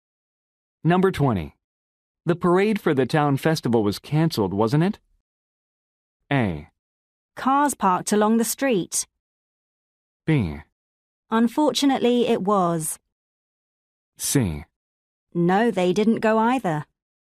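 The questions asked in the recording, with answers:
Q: The parade for the town festival was cancelled, wasn't it?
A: B: Unfortunately, it was.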